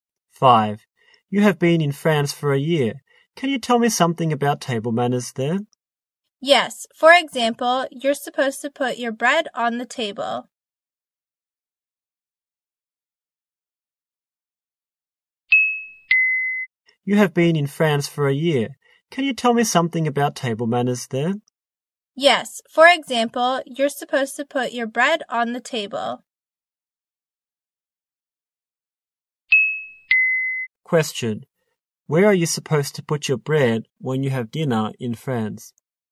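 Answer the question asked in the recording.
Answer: On the table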